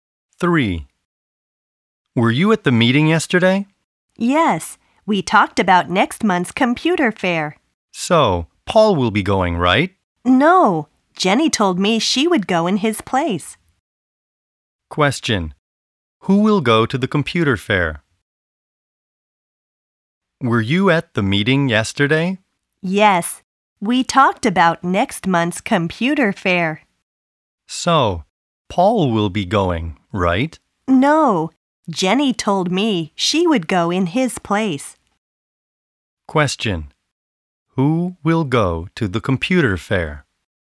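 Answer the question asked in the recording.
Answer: Jenny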